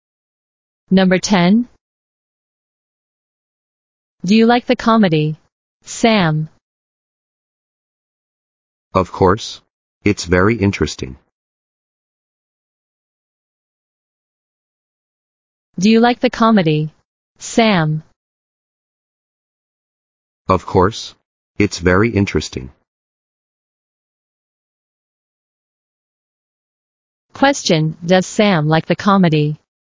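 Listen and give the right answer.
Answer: Yes, he does.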